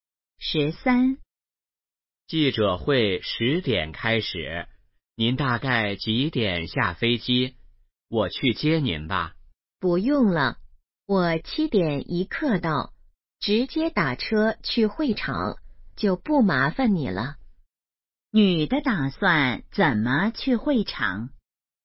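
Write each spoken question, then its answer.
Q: 女的打算怎么去会场?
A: 打车去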